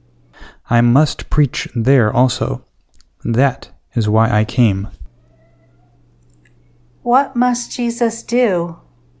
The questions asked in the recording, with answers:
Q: What must Jesus do?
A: Jesus must preach.